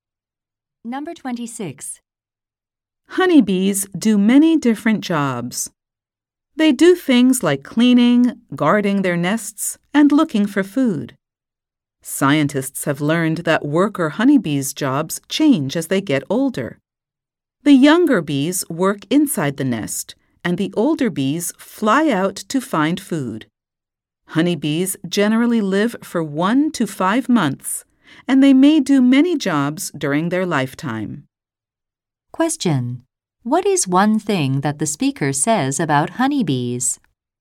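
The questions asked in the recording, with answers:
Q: What is one thing that the speaker says about honeybees?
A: Worker honeybees' jobs change as they get older.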